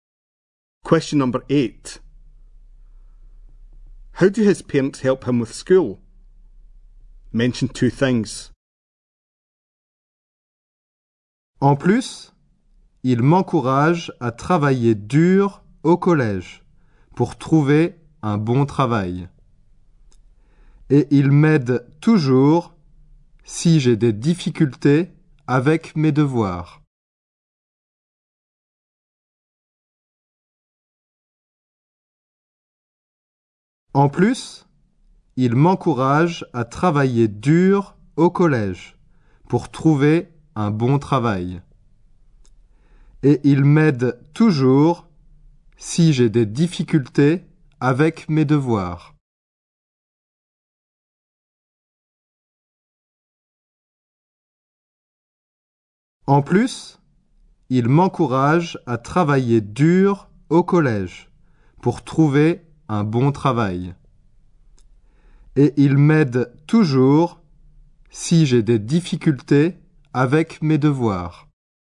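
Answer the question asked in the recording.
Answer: They encourage him to work hard to find a good job, and always help if he has difficulties with homework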